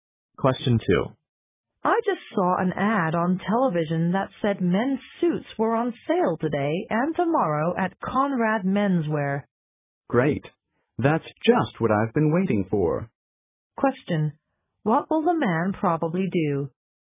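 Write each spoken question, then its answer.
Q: What will the man probably do?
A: Buy a suit at the sale at Conrad Menswear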